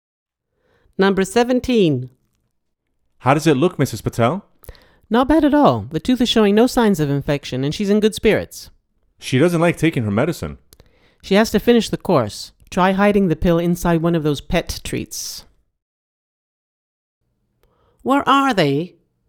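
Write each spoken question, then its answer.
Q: Where are they?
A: At the vet's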